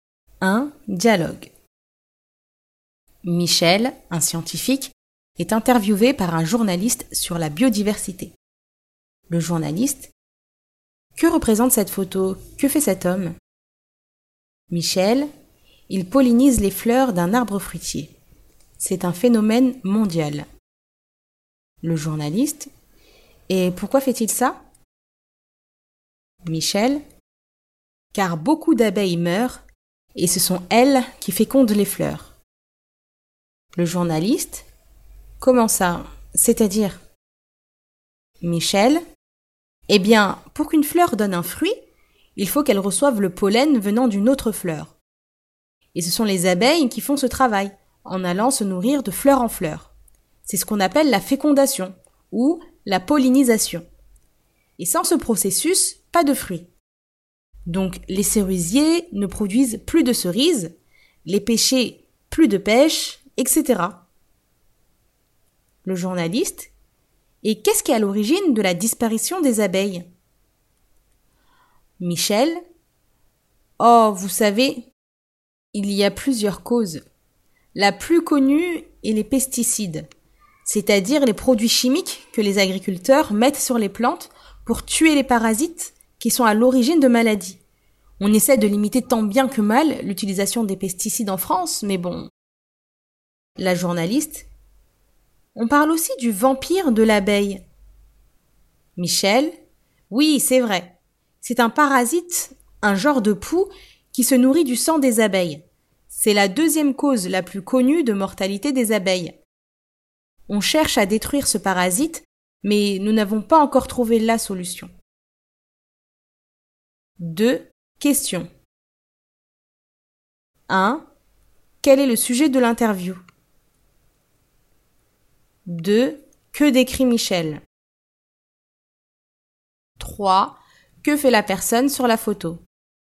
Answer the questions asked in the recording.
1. Les abeilles.
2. Une photo.
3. Elle pollinise des fleurs.